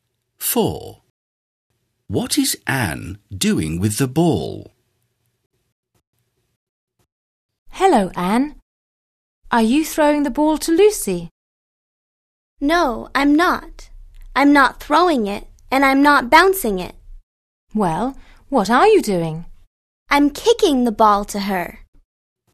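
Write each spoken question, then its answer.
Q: What is Anne doing with the ball?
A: Kicking it to Lucy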